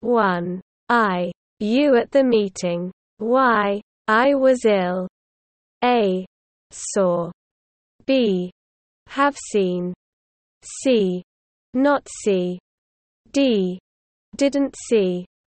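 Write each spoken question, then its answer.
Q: I. You at the meeting. Y. I was ill.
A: D: Didn't see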